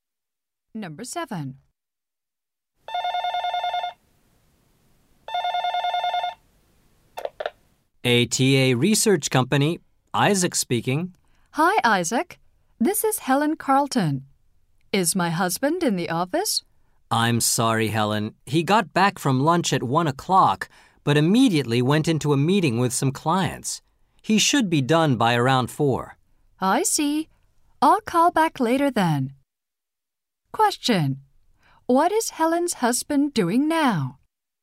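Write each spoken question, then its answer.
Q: What is Helen's husband doing now?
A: Meeting with some clients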